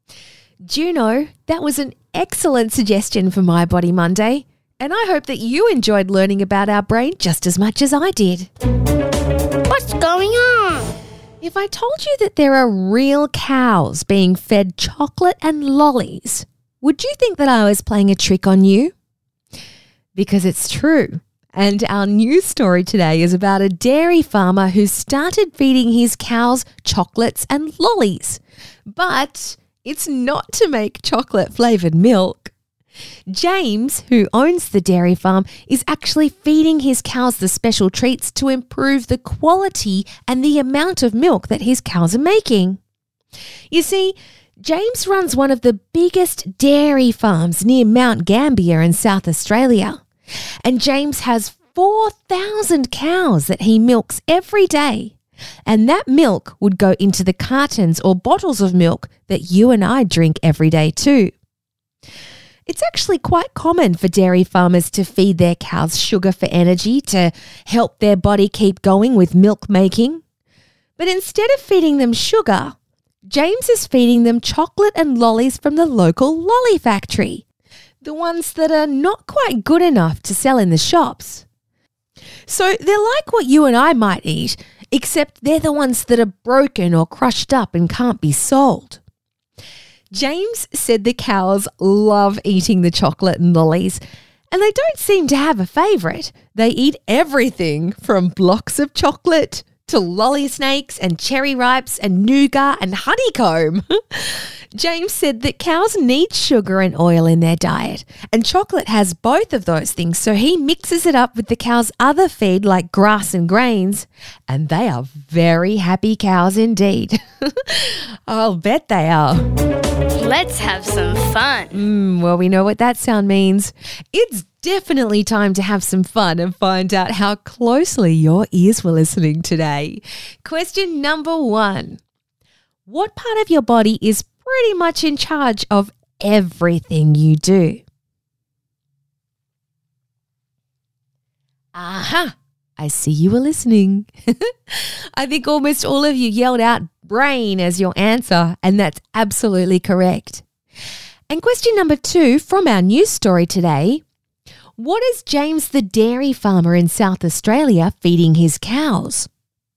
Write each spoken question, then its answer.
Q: What is James the dairy farmer in South Australia feeding his cows?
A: I think just about every single person answered chocolate and lollies.